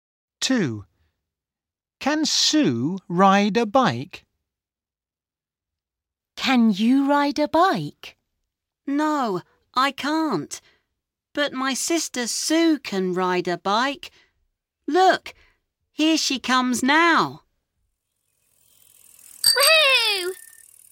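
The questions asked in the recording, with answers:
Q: Can Sue ride a bike?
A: Yes, she can.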